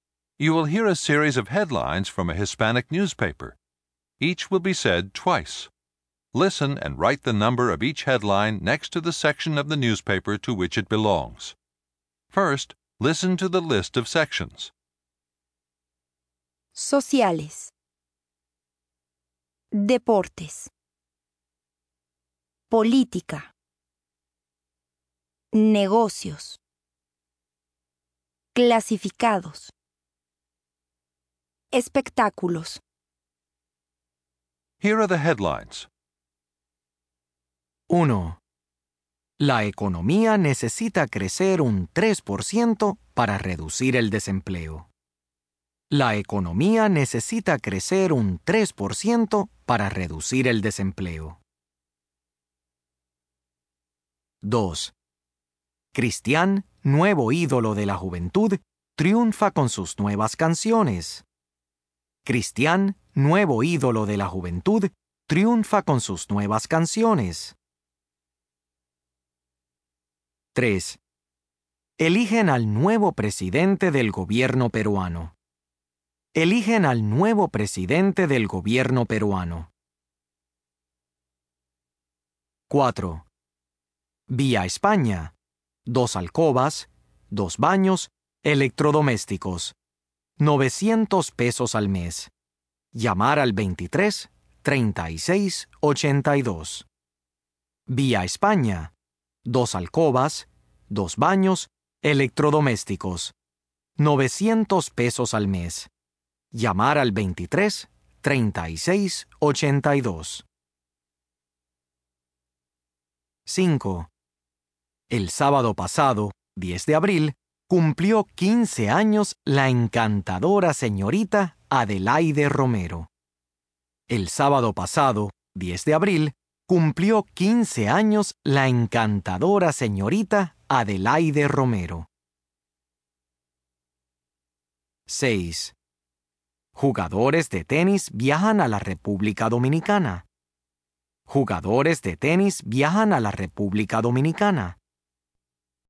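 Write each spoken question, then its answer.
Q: La economía necesita crecer un 3% para reducir el desempleo.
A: Negocios

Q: Eligen al nuevo presidente del gobierno peruano.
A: Política

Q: Vía España. Dos alcobas, dos baños, electrodomésticos.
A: Clasificados

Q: El sábado pasado, 10 de abril, cumplió 15 años la encantadora señorita Adelaide Romero.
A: Sociales

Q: Jugadores de tenis viajan a la República Dominicana.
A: Deportes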